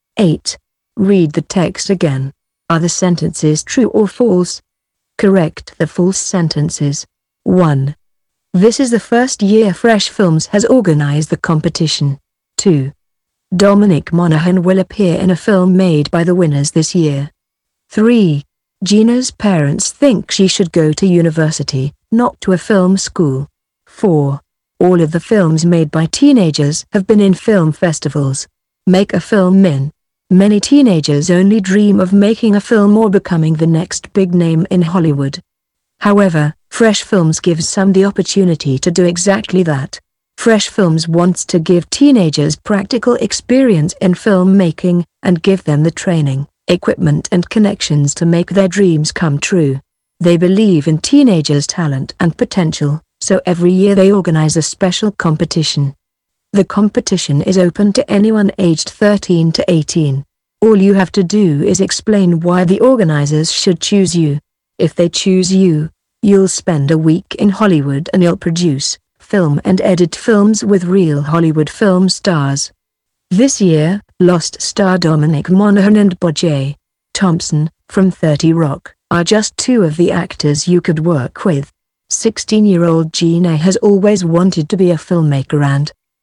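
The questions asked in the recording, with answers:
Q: This is the first year Fresh Films has organized the competition.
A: False: they organize the competition every year.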